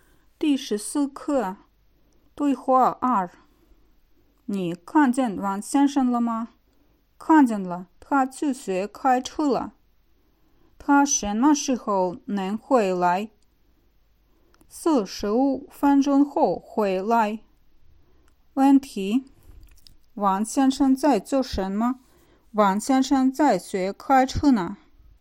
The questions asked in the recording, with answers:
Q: 王先生在做什么?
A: 王先生在学开车呢。